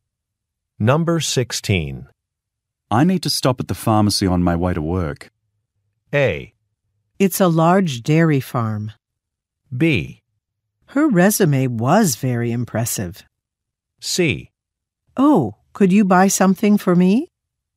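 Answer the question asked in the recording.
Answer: C: Oh, could you buy something for me?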